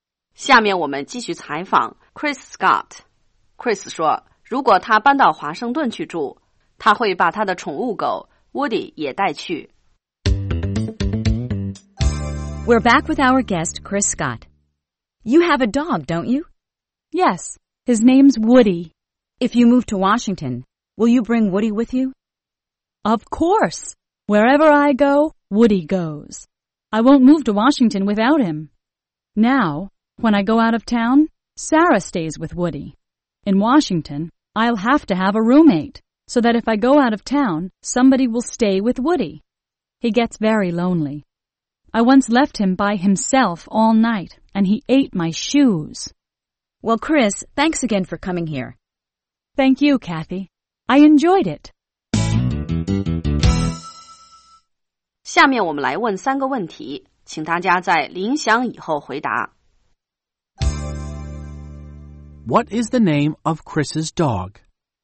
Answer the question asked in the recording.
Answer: His name is Woody.